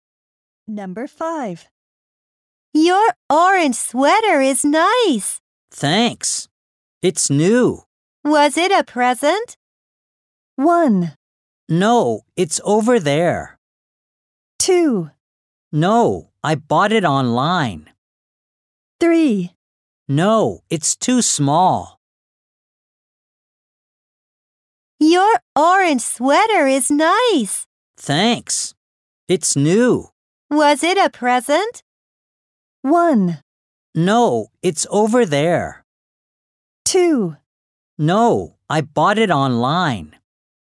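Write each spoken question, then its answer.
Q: Was it a present?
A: 2: No, I bought it online.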